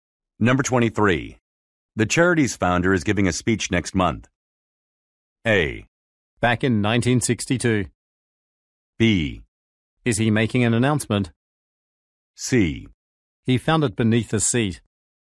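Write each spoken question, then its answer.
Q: The charity's founder is giving a speech next month.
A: B: Is he making an announcement?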